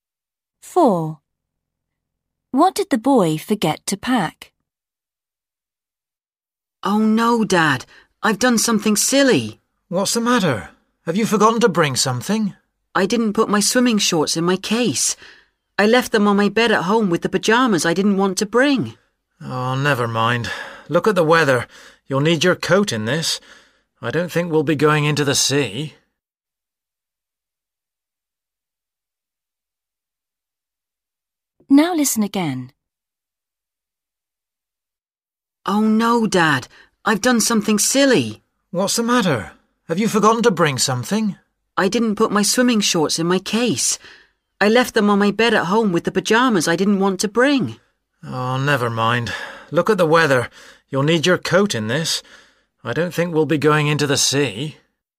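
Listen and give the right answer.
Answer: his swimming shorts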